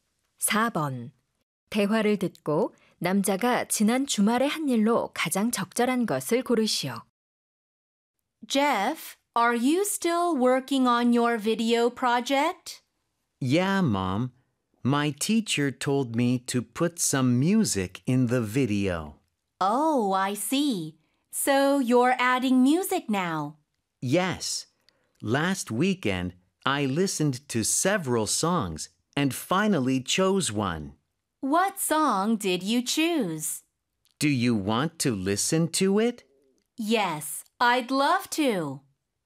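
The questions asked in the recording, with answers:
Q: 대화를 듣고 남자가 지난 주말에 한 일로 가장 적절한 것을 고르시오.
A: 여러 노래를 듣고 영상에 넣을 노래를 골랐다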